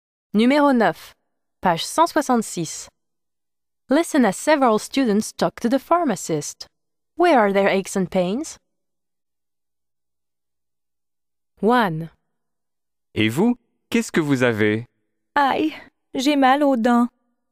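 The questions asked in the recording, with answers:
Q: Where are their aches and pains?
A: teeth (toothache)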